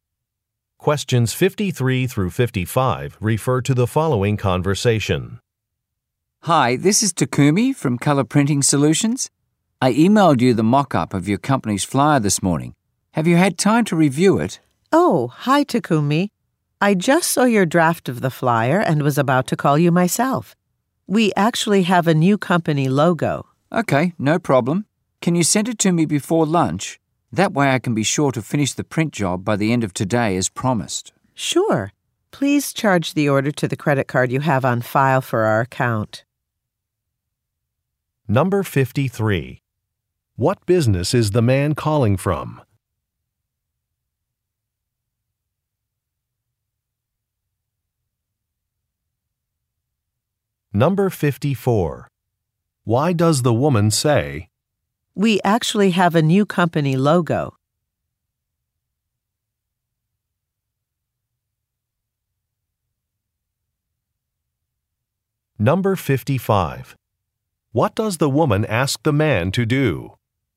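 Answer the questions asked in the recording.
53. A printing company
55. Charge the order to the credit card on file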